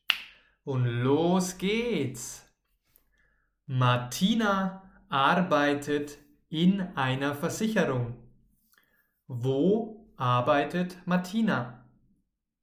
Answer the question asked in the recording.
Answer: In einer Versicherung. Martina arbeitet in einer Versicherung.